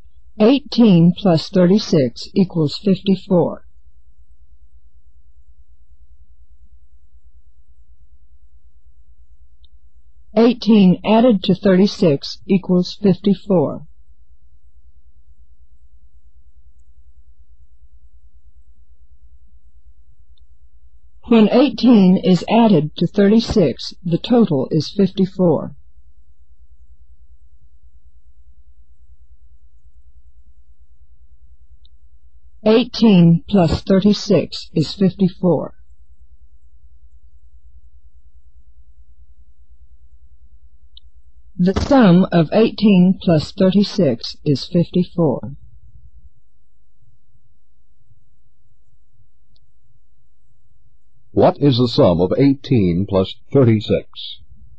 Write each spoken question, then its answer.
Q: 18 plus 36?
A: 54.